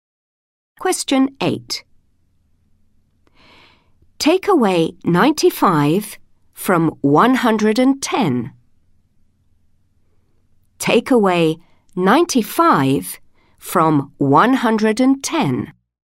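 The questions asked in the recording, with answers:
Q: Take away 95 from 110.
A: 15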